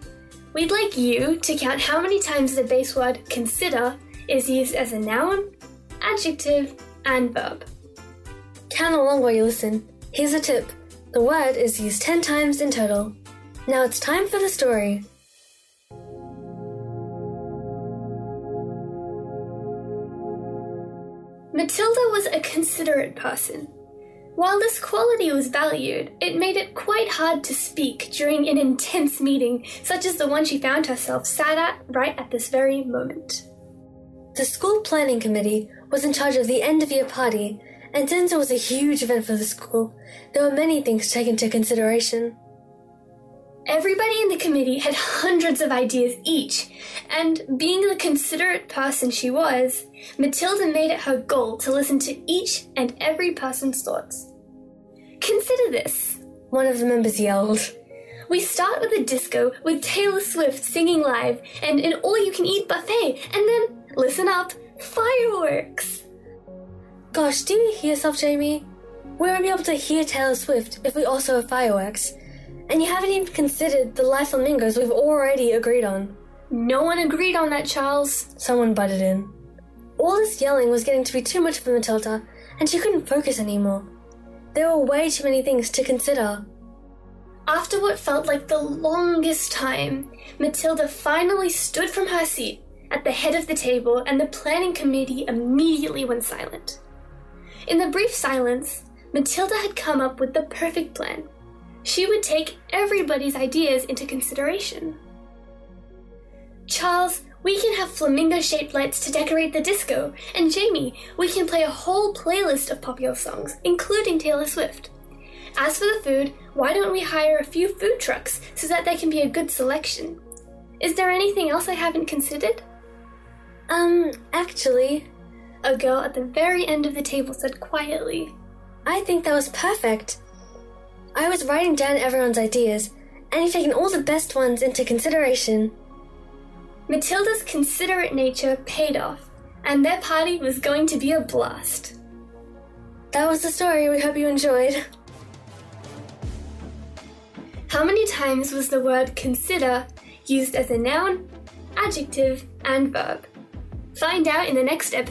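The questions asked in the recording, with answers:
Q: How many times was the word consider used as a noun, adjective, and verb?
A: 3 nouns, 3 adjectives, 4 verbs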